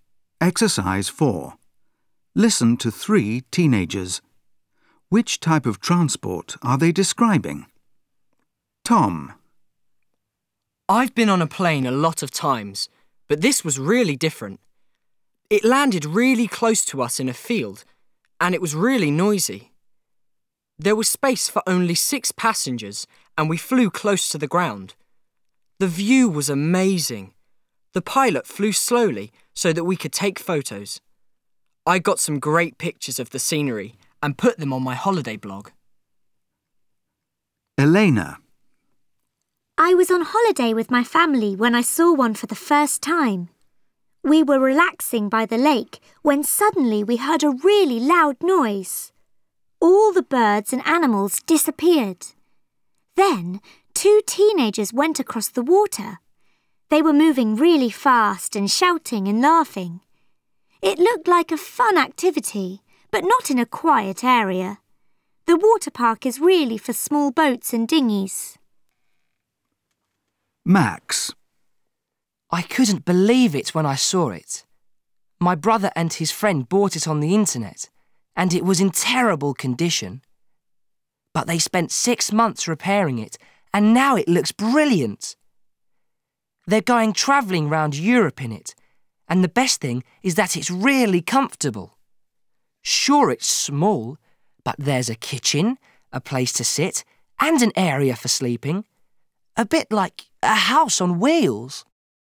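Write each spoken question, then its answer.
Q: Which type of transport are they describing?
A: a helicopter

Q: Which type of transport are they describing?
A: a camper van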